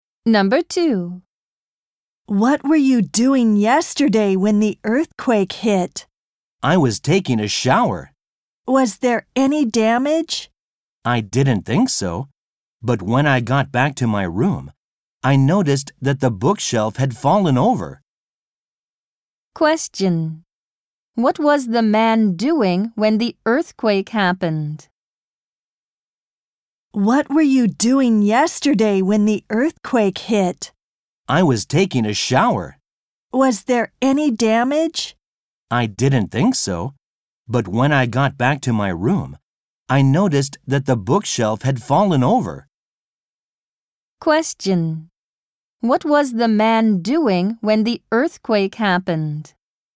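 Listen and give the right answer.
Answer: Taking a shower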